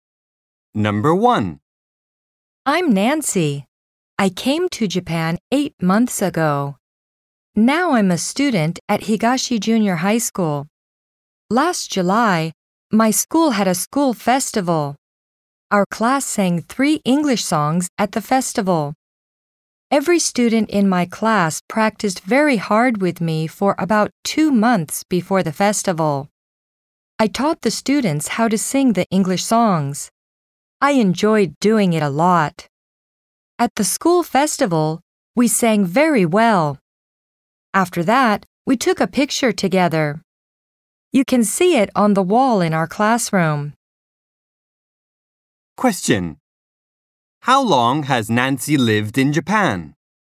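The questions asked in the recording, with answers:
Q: How long has Nancy lived in Japan?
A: For 8 months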